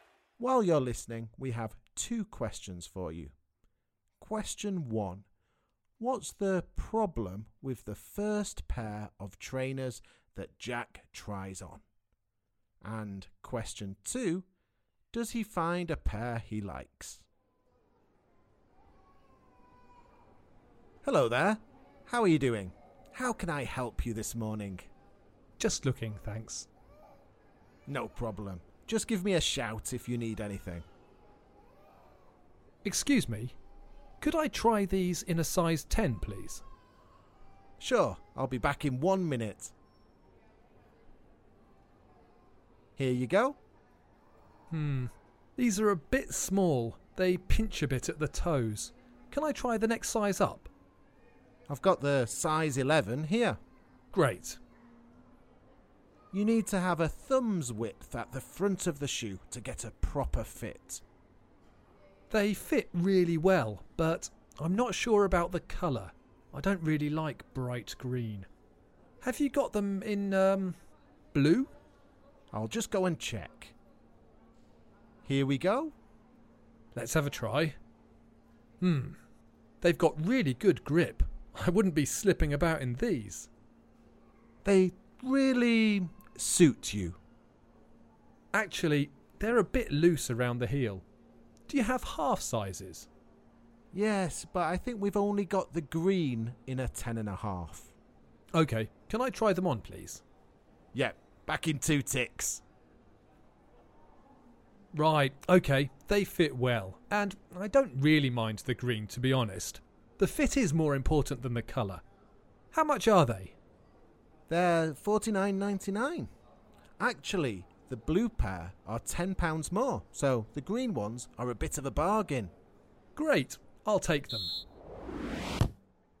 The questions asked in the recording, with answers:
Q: What's the problem with the first pair of trainers that Jack tries on?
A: Jack said the first pair of trainers pinched at the toes.